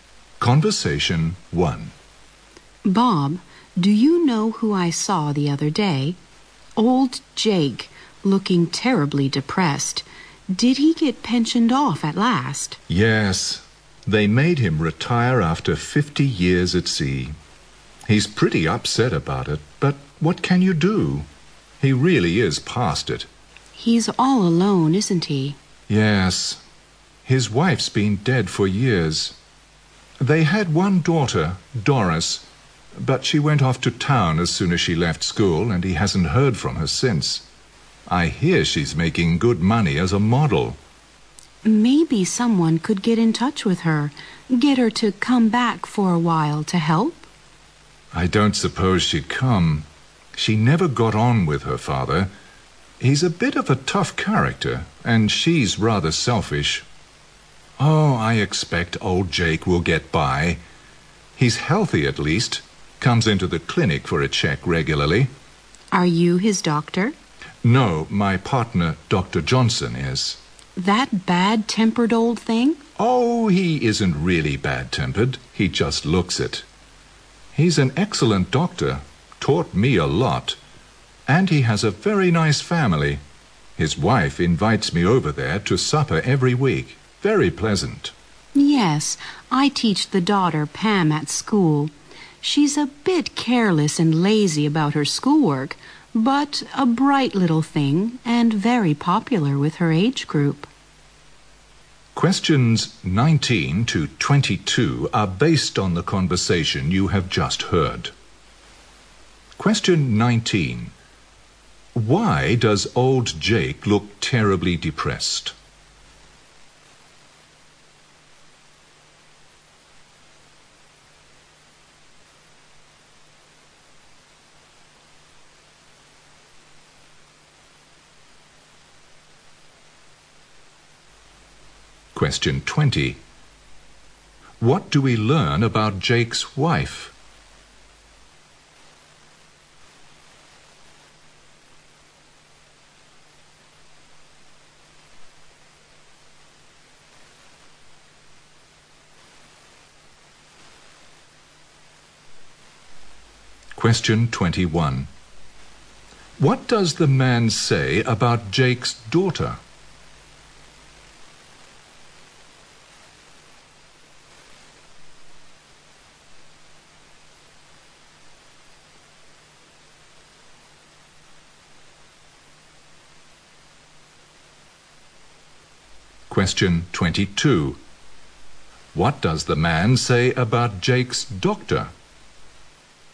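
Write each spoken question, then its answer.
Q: Why does old Jake look terribly depressed?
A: He was made to retire after 50 years at sea.

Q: What do we learn about Jake's wife?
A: She died years ago.

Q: What does the man say about Jake's daughter?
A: She is selfish and never got on with her father.

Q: What does the man say about Jake's doctor?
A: He is an excellent doctor, though he looks bad-tempered.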